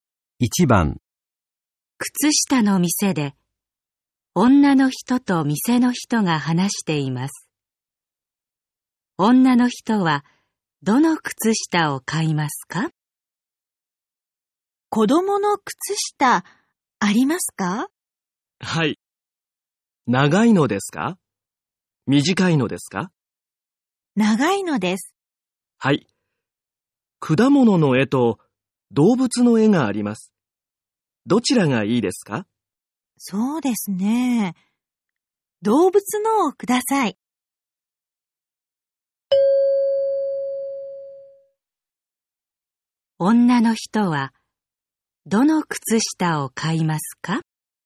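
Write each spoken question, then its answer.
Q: 女の人はどの靴下を買いますか?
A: 動物の絵がある長い子供の靴下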